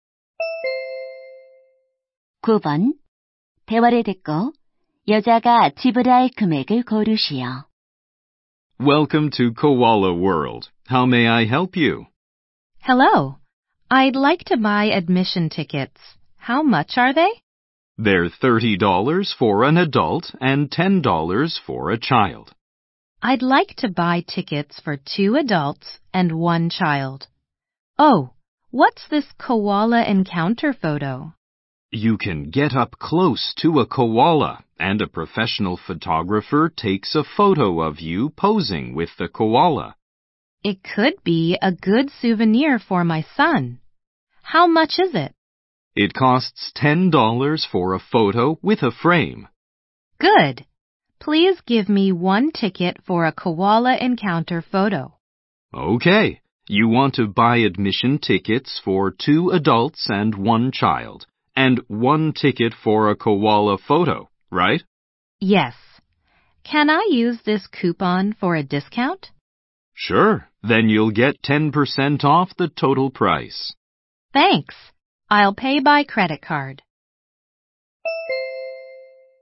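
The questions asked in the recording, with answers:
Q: 대화를 듣고 여자가 지불할 금액을 고르시오.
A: $72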